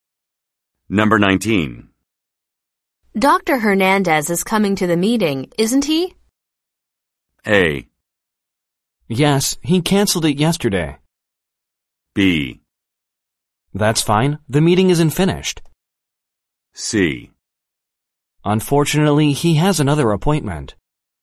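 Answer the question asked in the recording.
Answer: C: Unfortunately, he has another appointment.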